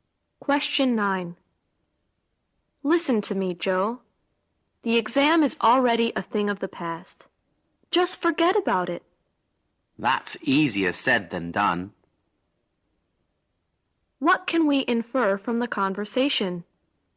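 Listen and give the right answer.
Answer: Joe finds it hard to stop worrying about the exam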